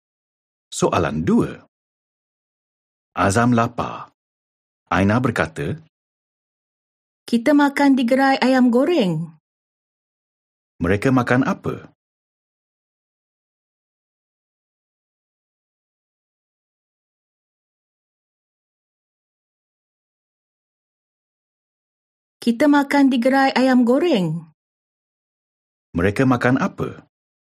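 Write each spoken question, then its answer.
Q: Mereka makan apa?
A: Ayam goreng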